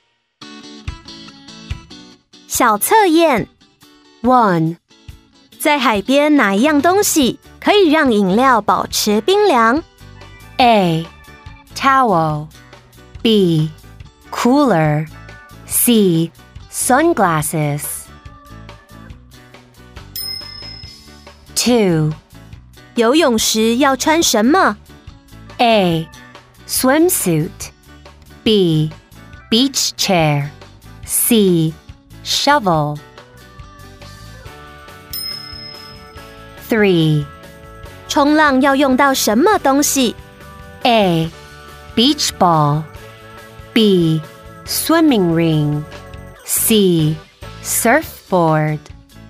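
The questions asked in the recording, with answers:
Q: 在海边哪一样东西可以让饮料保持冰凉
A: B: Cooler

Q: 游泳时要穿什么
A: A: Swimsuit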